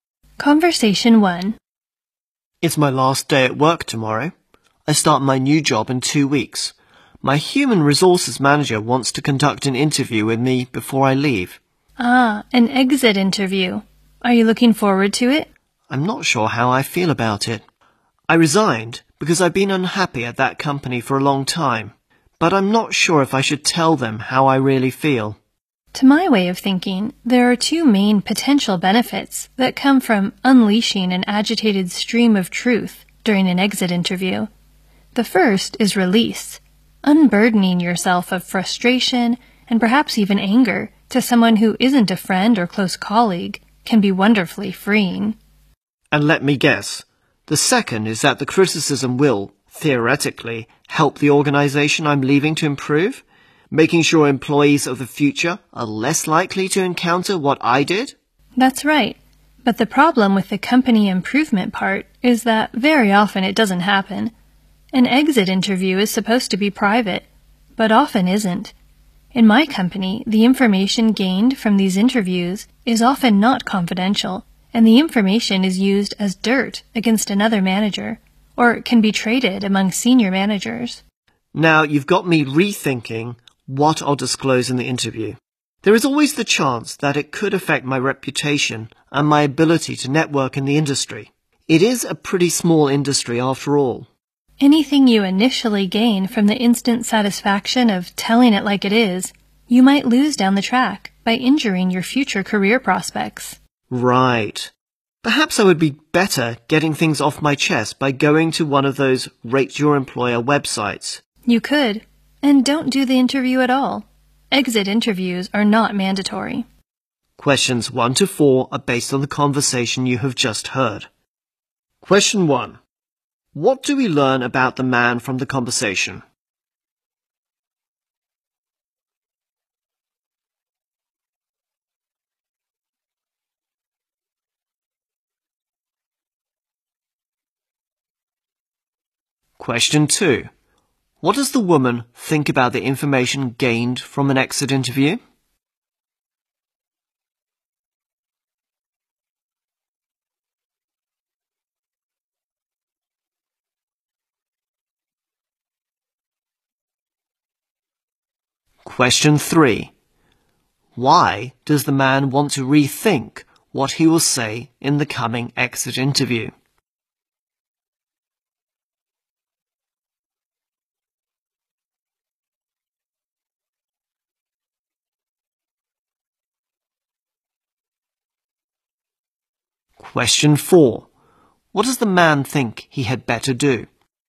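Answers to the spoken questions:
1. He is leaving his job tomorrow after resigning because he was unhappy there, and he starts a new job in 2 weeks
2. It is often not kept confidential and may be used against other managers
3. It could hurt his reputation and his networking in a small industry
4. Air his complaints on a Rate Your Employer website instead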